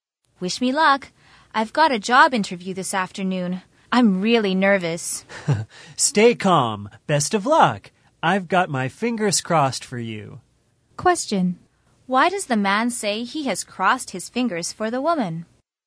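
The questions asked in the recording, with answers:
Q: Why does the man say he has crossed his fingers for the woman?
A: To wish her luck in her job interview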